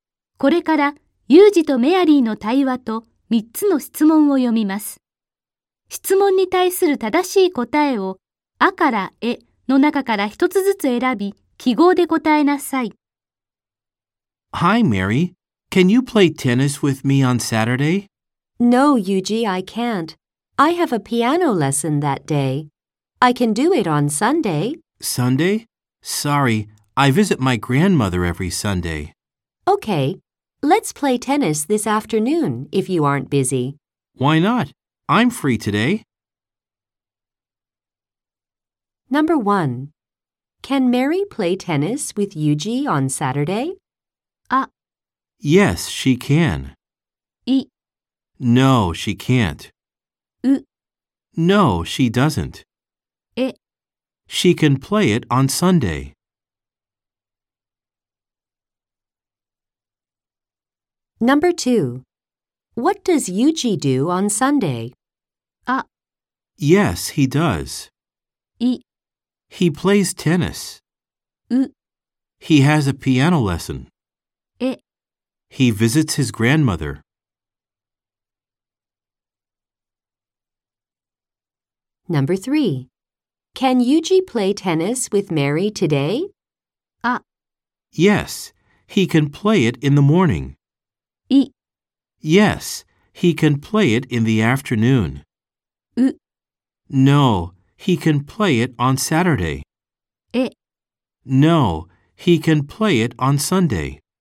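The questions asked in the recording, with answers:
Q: Can Mary play tennis with Yuji on Saturday?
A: い: No, she can't.

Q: What does Yuji do on Sunday?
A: え: He visits his grandmother.

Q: Can Yuji play tennis with Mary today?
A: い: Yes, he can play it in the afternoon.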